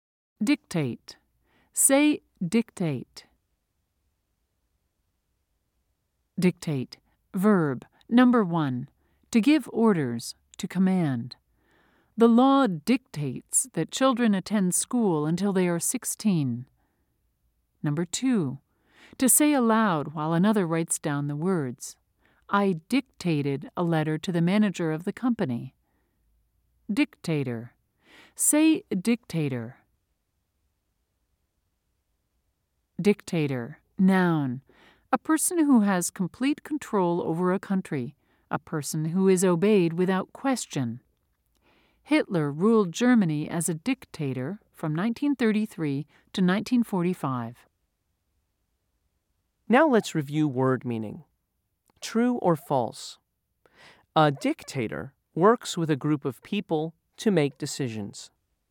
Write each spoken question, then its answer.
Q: True or false? A dictator works with a group of people to make decisions.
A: If you said false, you are right.